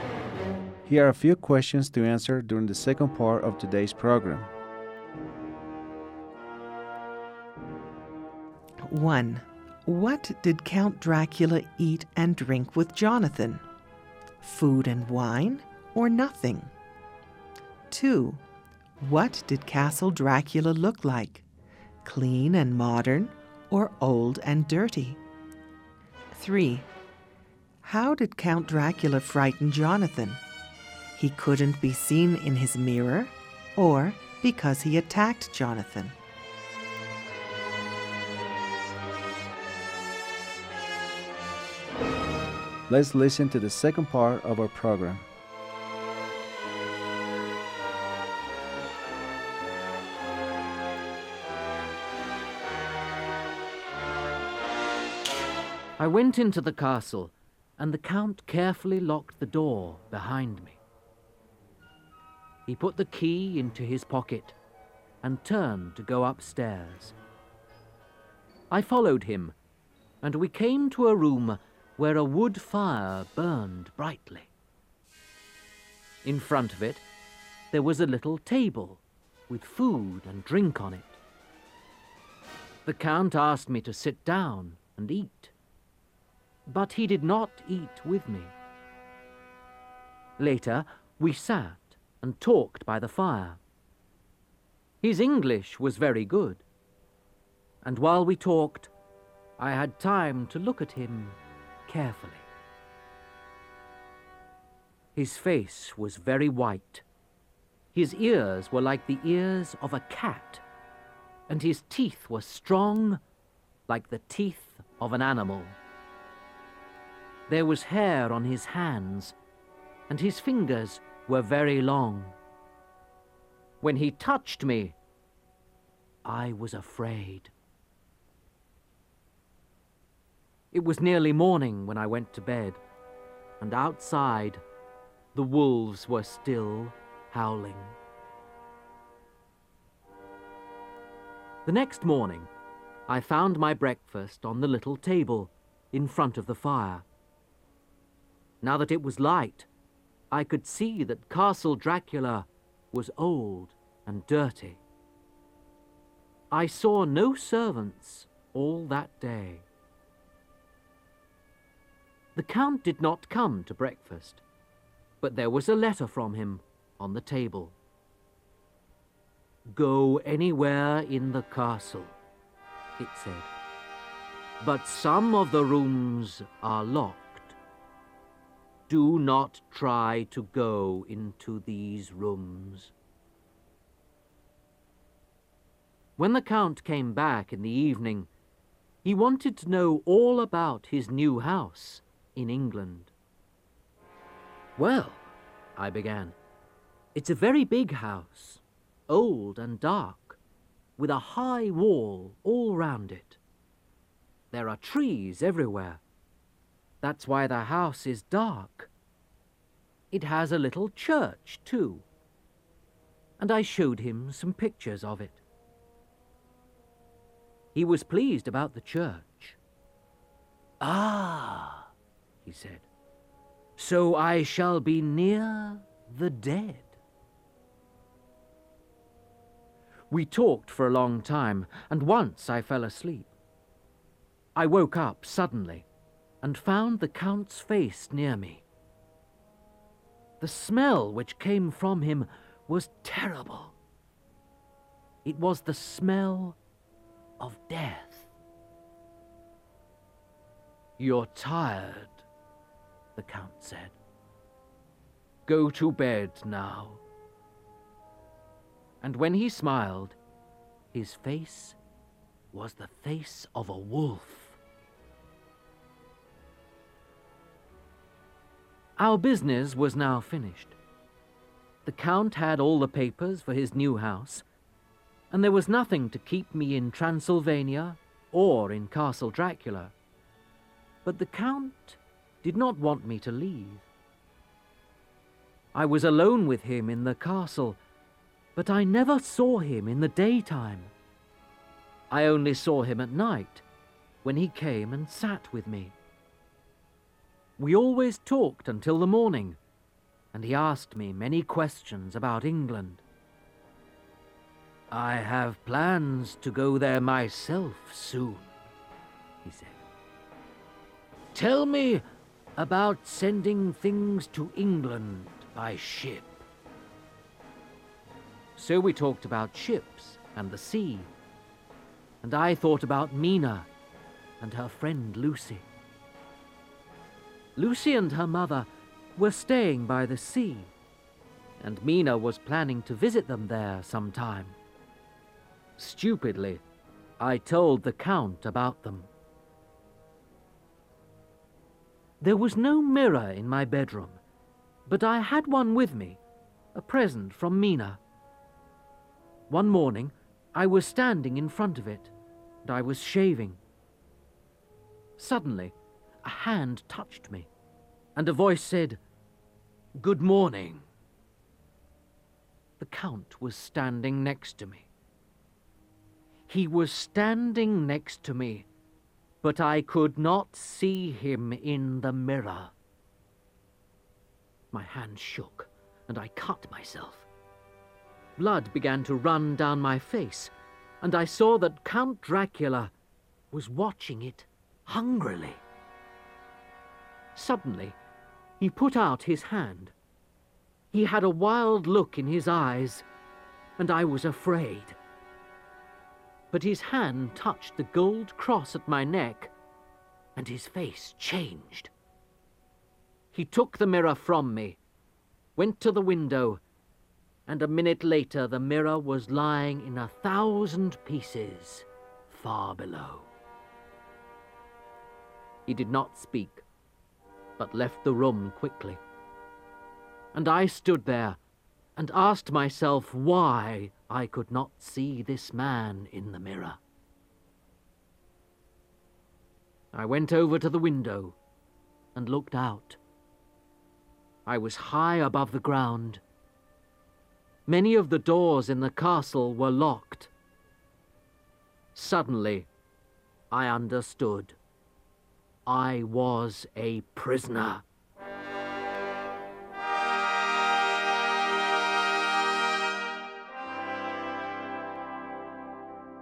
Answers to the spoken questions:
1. Jonathan ate, but Count Dracula ate nothing.
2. in the light of day, Castle Dracula was old and dirty.
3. Jonathan became frightened because he couldn't see the Count in the mirror, even though they were standing beside each other.